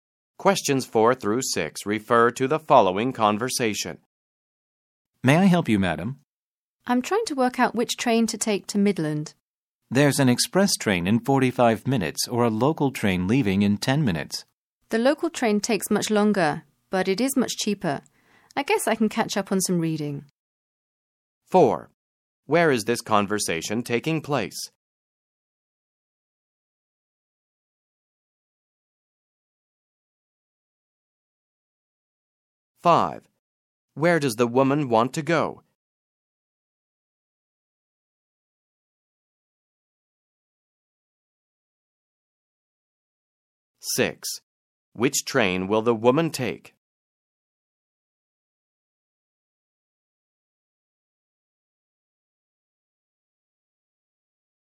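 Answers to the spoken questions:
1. At a train station
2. Midland
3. The local train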